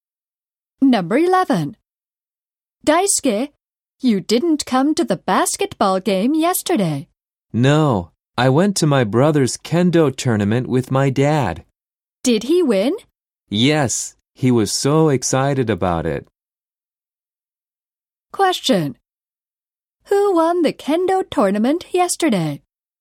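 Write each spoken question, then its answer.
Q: Who won the kendo tournament yesterday?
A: Daisuke's brother.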